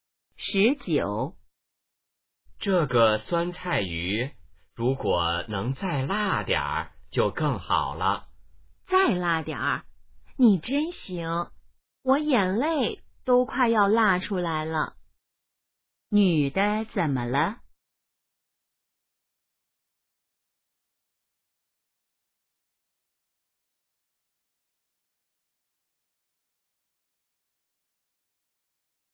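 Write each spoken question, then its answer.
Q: 女的怎么了?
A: 辣得快流眼泪了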